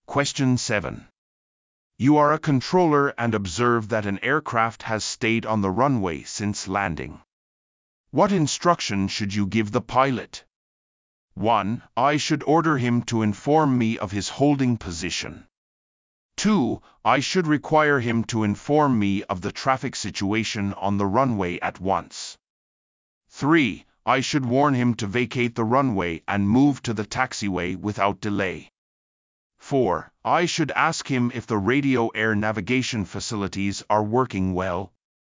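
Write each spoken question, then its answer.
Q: What instruction should you give the pilot?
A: 3: I should warn him to vacate the runway and move to the taxiway without delay.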